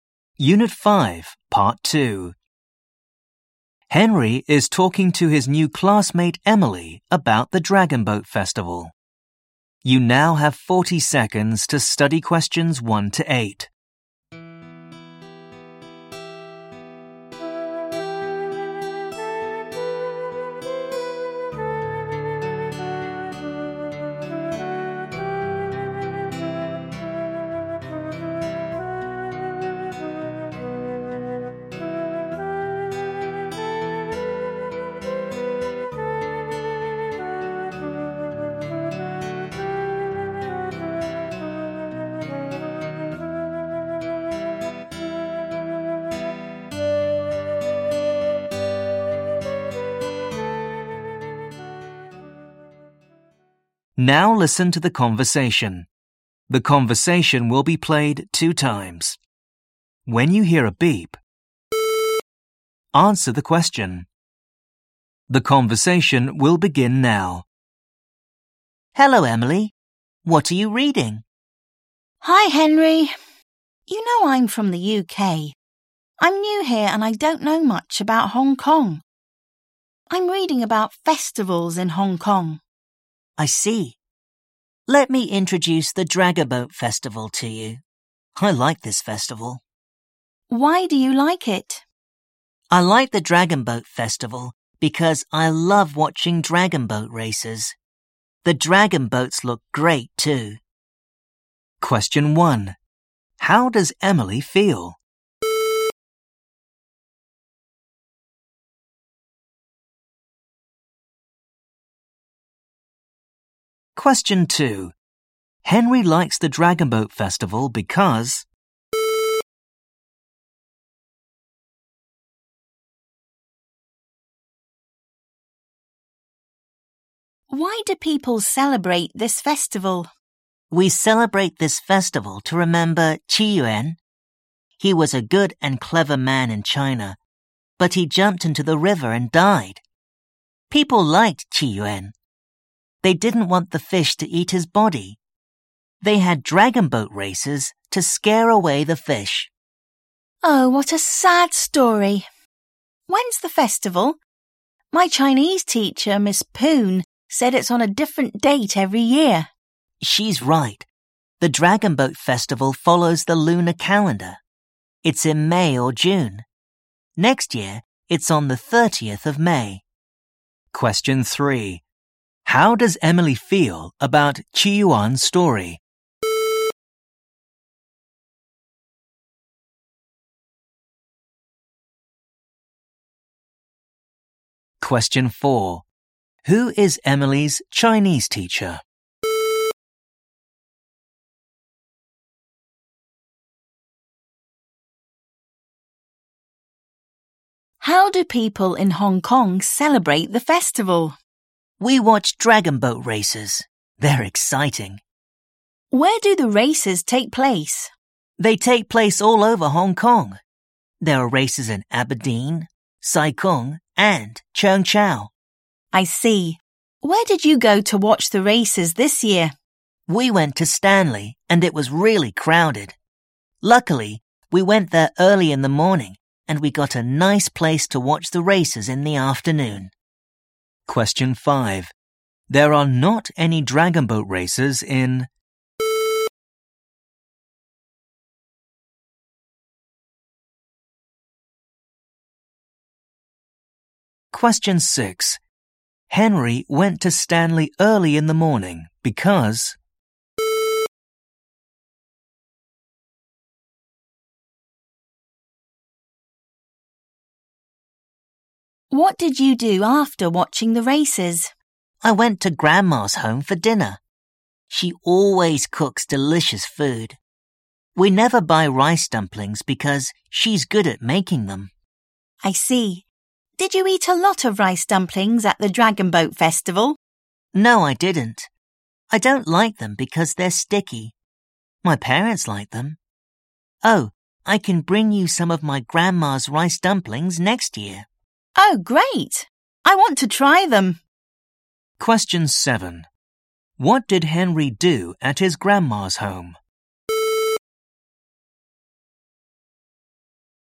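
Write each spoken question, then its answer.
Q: Henry likes the Dragon Boat Festival because...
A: he loves watching dragon boat races

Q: How does Emily feel about Qi Yuan's story?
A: sad

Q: Who is Emily's Chinese teacher?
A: Miss Poon

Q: Henry went to Stanley early in the morning because...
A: to get a nice place to watch the races

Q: What did Henry do at his grandma's home?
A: He had dinner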